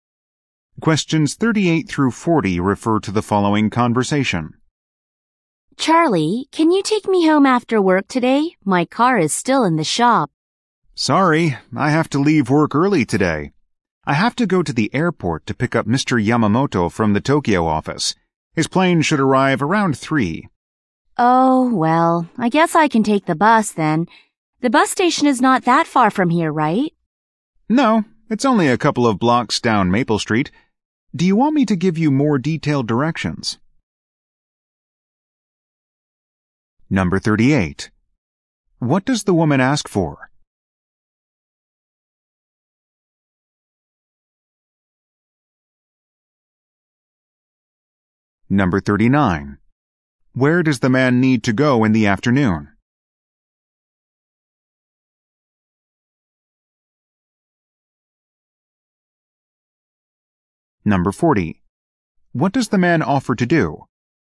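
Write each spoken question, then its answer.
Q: What does the woman ask for?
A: A ride home after work

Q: Where does the man need to go in the afternoon?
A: To the airport

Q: What does the man offer to do?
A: Give more detailed directions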